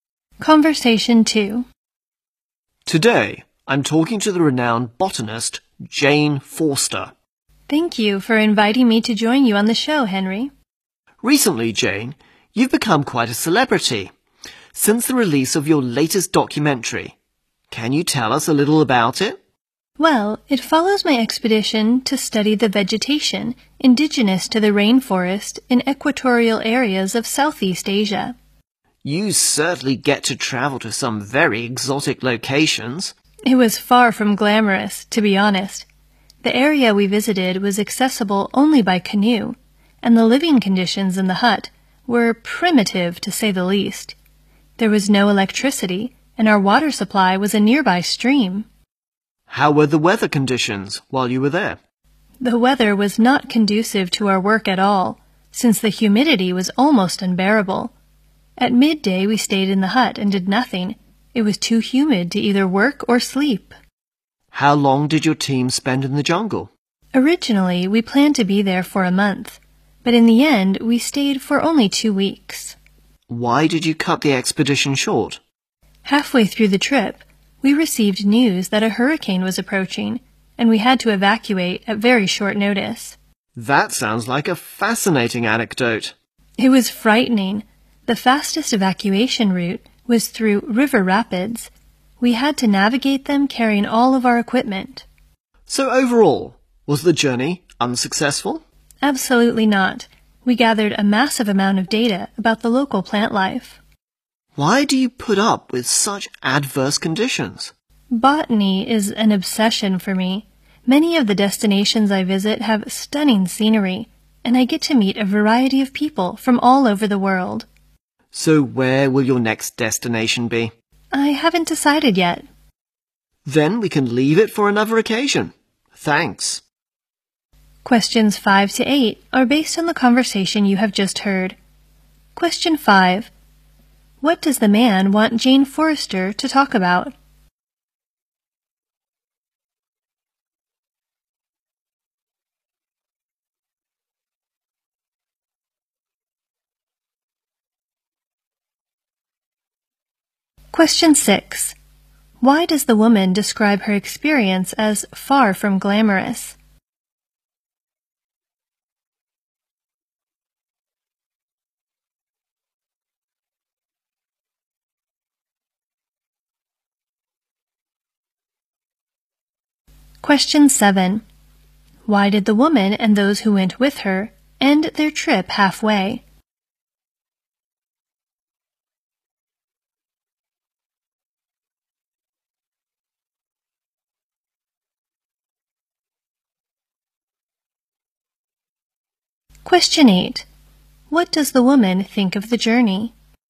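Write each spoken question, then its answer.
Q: What does the man want Jane Forrester to talk about?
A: Her latest documentary

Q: Why does the woman describe her experience as far from glamorous?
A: The living conditions were primitive: the place was reachable only by canoe, with no electricity and a stream for water

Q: Why did the woman and those who went with her end their trip halfway?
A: A hurricane was approaching and they had to evacuate

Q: What does the woman think of the journey?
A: It was successful; they gathered a massive amount of data on the local plants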